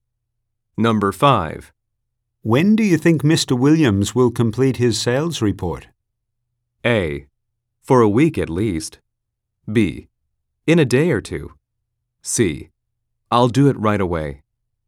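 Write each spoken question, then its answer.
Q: When do you think Mr. Williams will complete his sales report?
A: B: In a day or two.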